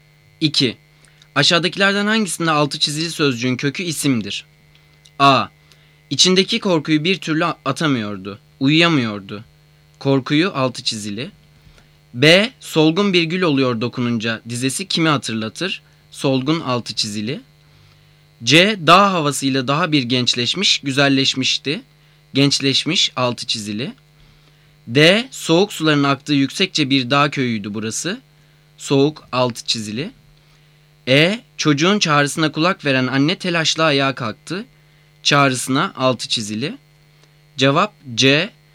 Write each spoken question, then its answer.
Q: Aşağıdakilerden hangisinde altı çizili sözcüğün kökü isimdir?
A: Cevap C.